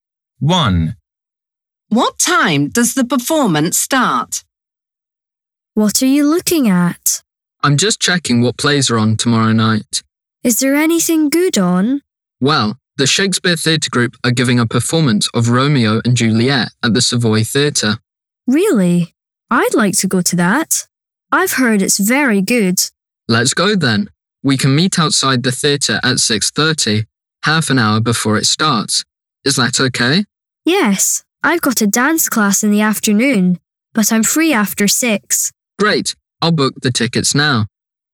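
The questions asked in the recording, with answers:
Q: What time does the performance start?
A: At 7:00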